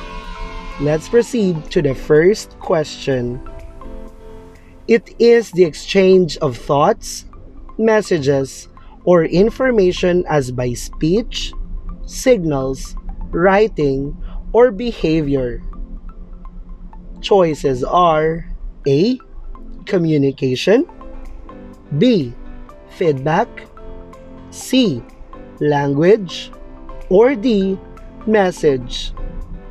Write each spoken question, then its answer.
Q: It is the exchange of thoughts, messages, or information as by speech, signals, writing, or behavior.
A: If your answer is letter A, you are correct.